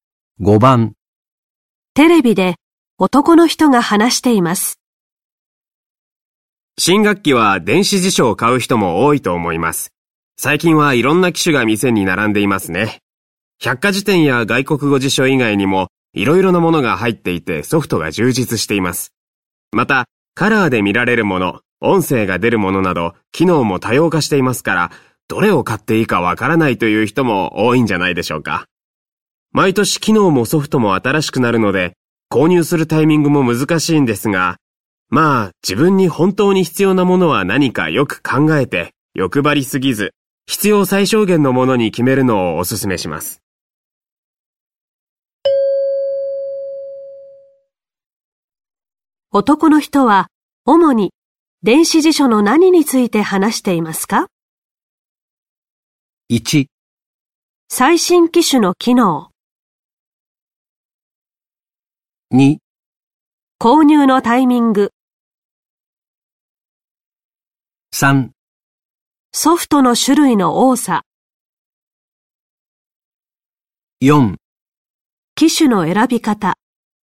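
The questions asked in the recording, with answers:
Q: 男の人は主に電子辞書の何について話していますか?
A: 4: 機種の選び方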